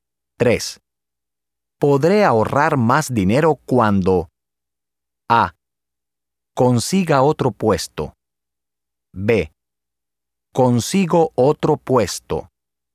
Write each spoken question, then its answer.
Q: Podré ahorrar más dinero cuando A. Consiga otro puesto. B. Consigo otro puesto.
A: A. Podré ahorrar más dinero cuando consiga otro puesto.